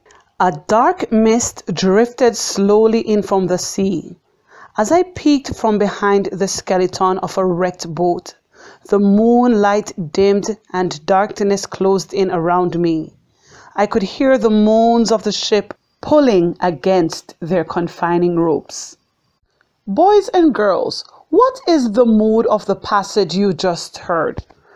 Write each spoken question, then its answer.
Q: Boys and girls, what is the mood of the passage you just heard?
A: Did you find the mood to be scary?